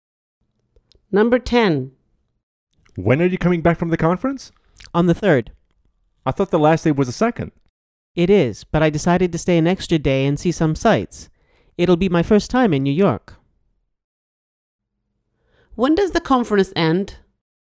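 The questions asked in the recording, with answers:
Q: When does the conference end?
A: On the 2nd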